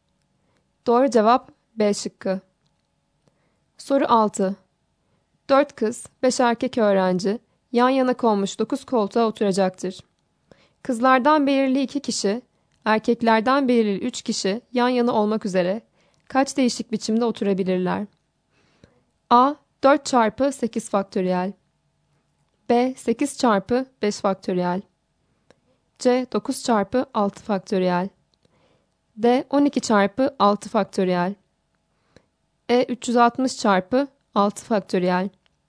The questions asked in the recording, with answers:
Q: 4 kız, 5 erkek öğrenci yan yana konmuş 9 koltuğa oturacaktır. Kızlardan belirli 2 kişi, erkeklerden belirli 3 kişi yan yana olmak üzere kaç değişik biçimde oturabilirler?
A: Doğru cevap D şıkkı.